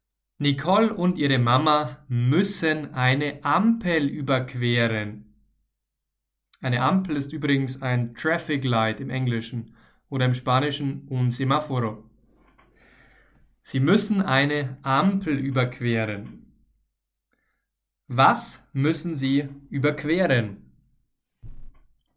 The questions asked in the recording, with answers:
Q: Was müssen Sie überqueren?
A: Eine Ampel. Sie müssen eine Ampel überqueren.